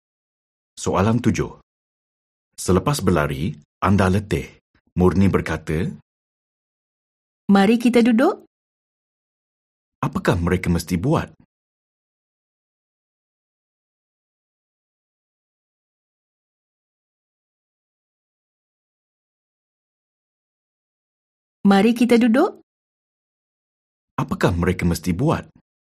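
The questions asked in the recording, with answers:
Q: Apakah mereka mesti buat?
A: duduk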